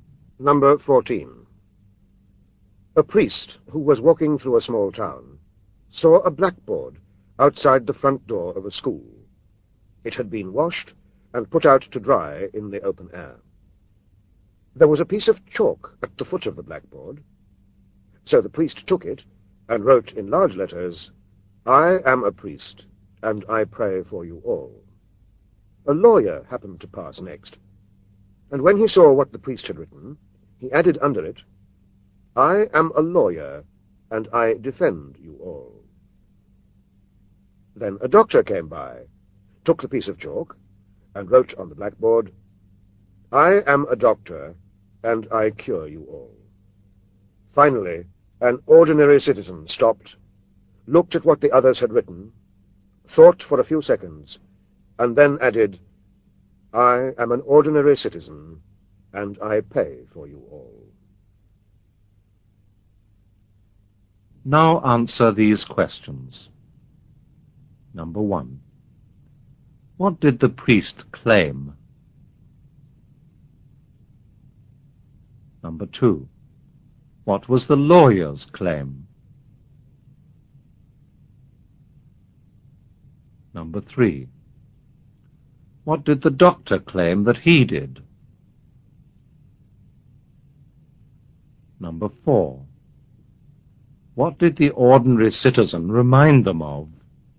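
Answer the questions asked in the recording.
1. He prayed for them all
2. He defended them all
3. He cured them all
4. That he paid for them all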